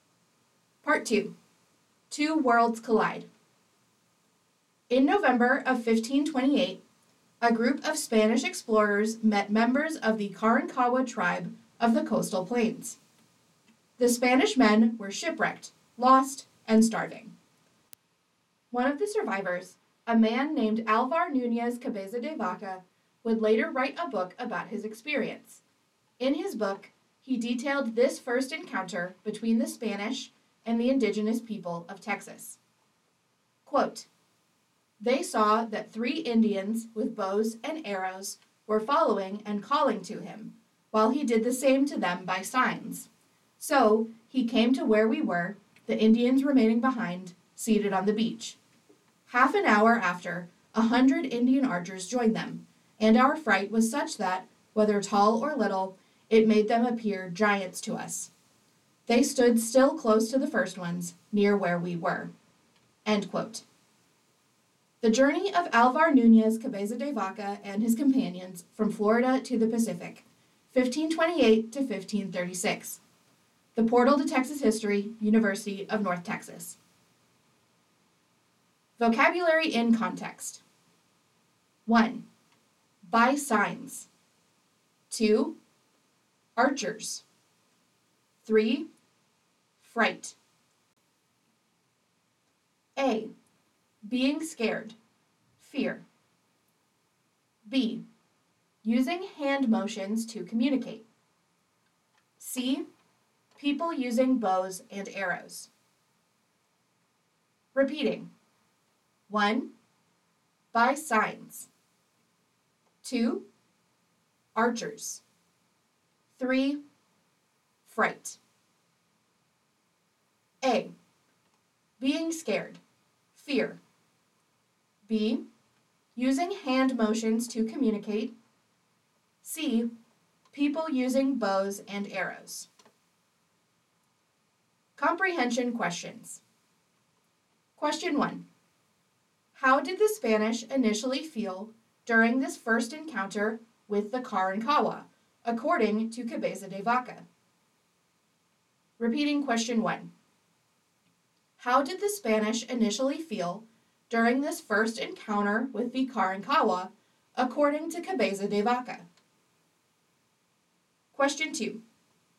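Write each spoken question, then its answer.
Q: How did the Spanish initially feel during this first encounter with the Carancagua, according to Cabeza de Vaca?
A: Frightened; the Indians seemed like giants to them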